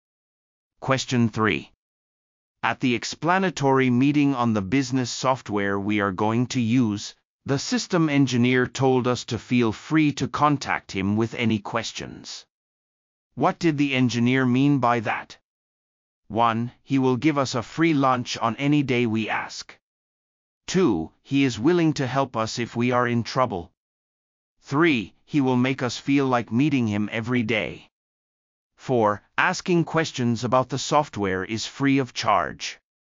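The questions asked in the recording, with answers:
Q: What did the engineer mean by that?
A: 2: He is willing to help us if we are in trouble.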